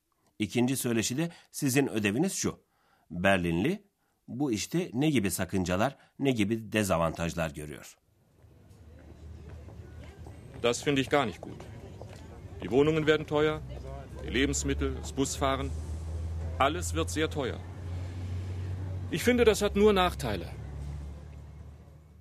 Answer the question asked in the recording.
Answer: Evet, en büyük sakınca şu.